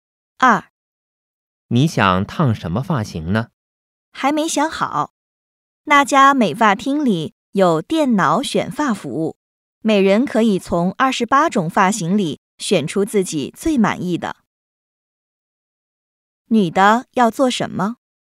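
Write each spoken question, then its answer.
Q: 女的要做什么?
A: 烫发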